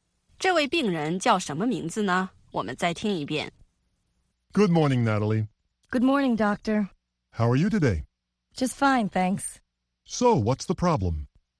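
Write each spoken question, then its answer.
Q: 这位病人叫什么名字呢?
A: Natalie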